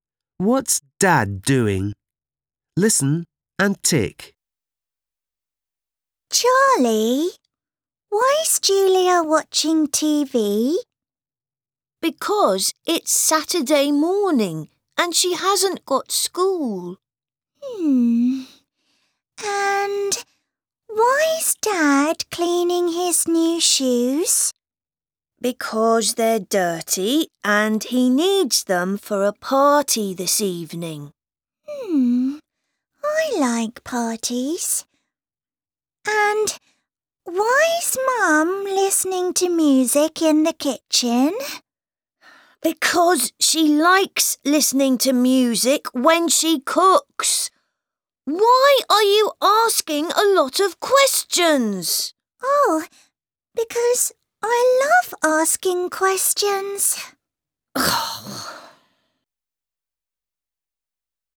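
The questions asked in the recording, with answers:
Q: What's Dad doing?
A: Cleaning his new shoes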